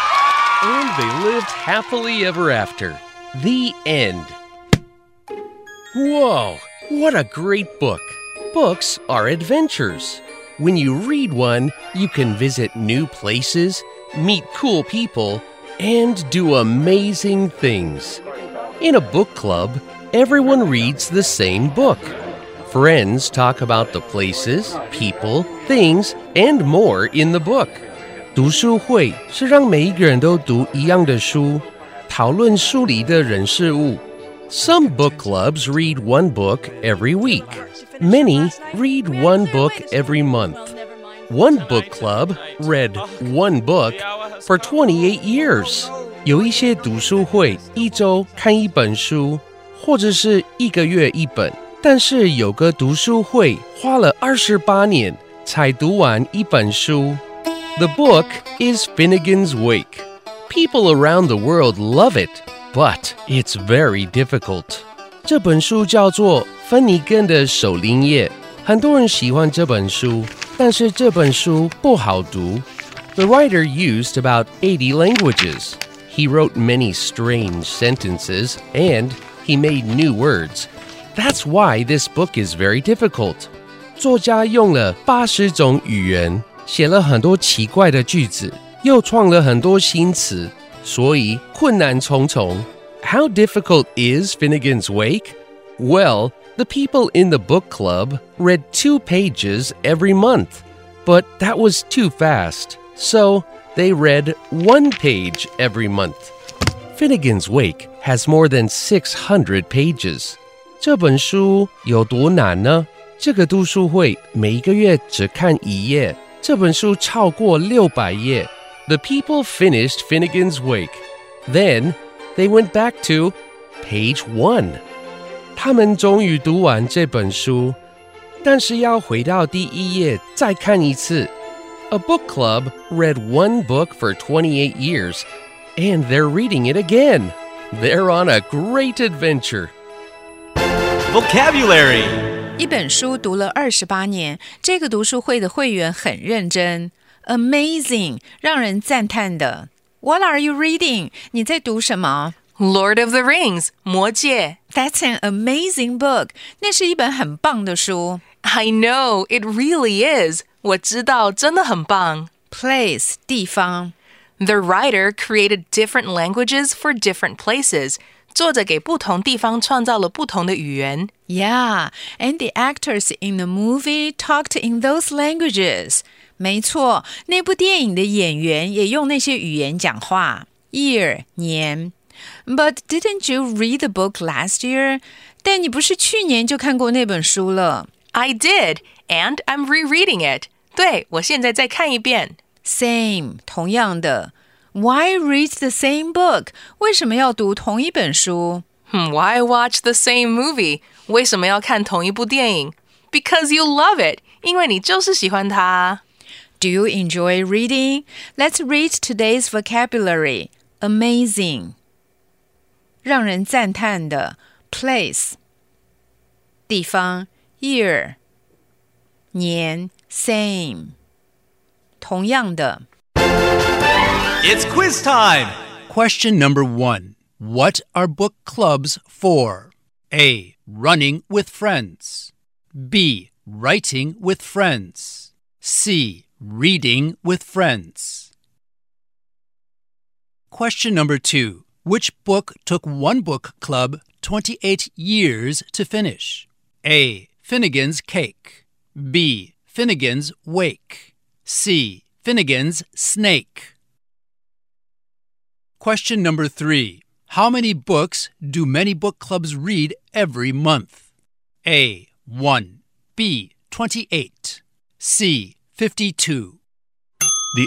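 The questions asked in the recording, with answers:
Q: What are book clubs for?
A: C: Reading with friends.

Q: Which book took one book club 28 years to finish?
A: B: Finnegan's Wake.

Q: How many books do many book clubs read every month?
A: A: 1.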